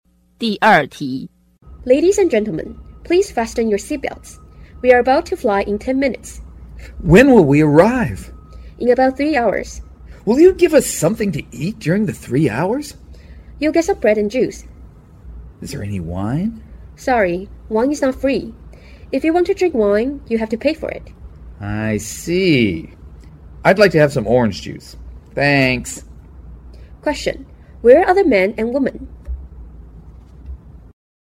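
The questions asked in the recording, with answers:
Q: Where are the men and women?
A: On an airplane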